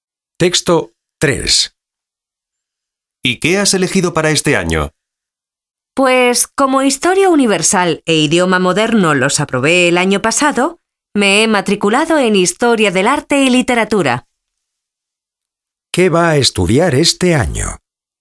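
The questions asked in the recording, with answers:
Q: ¿Qué va a estudiar este año?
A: Historia del arte y literatura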